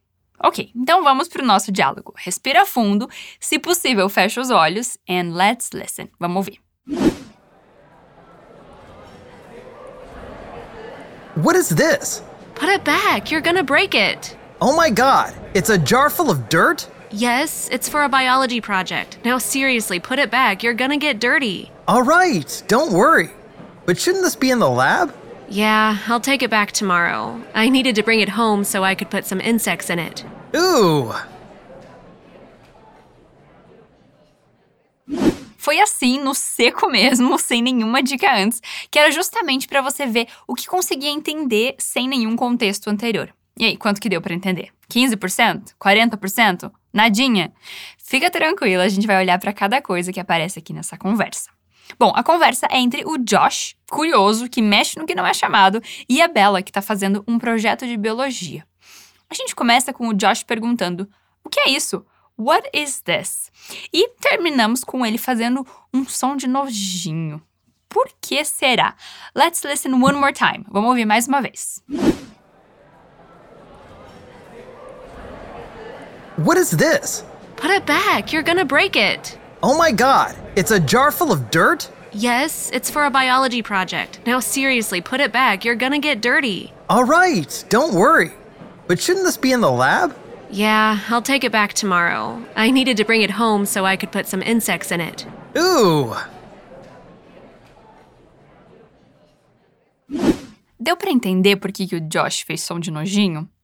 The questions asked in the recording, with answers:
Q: Deu para entender por que, que o Josh fez som de nojinho?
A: Ele ficou com nojo dos insetos, acredita?